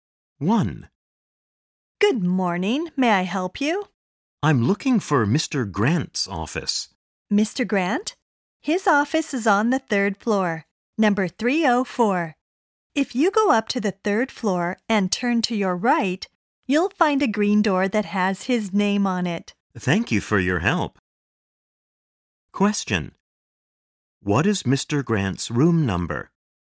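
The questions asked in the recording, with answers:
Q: What is Mr. Grant's room number?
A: 304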